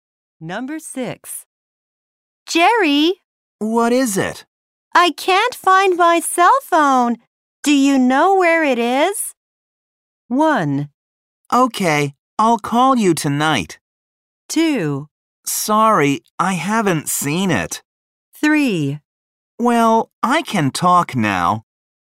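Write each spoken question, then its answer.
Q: Do you know where it is?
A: 2: Sorry, I haven't seen it.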